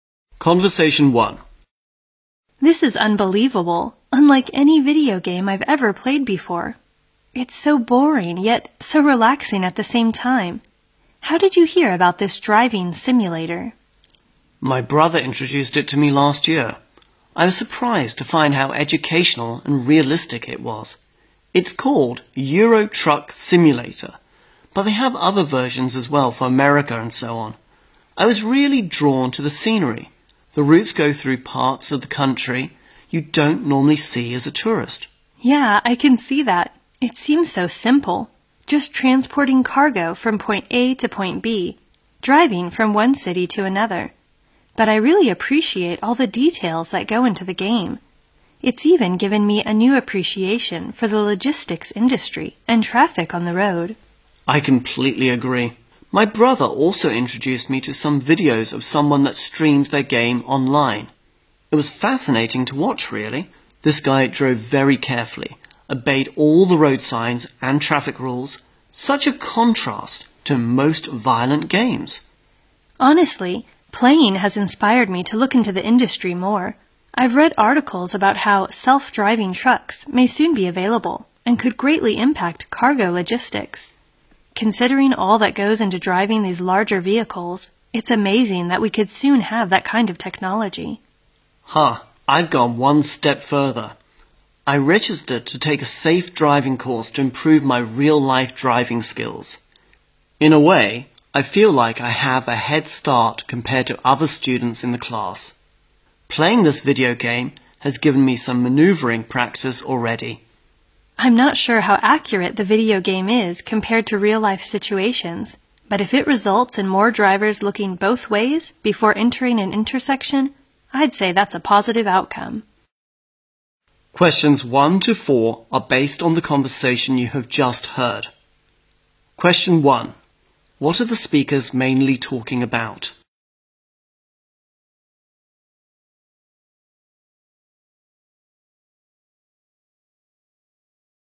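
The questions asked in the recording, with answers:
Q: What are the speakers mainly talking about?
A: A driving simulator video game (Euro Truck Simulator)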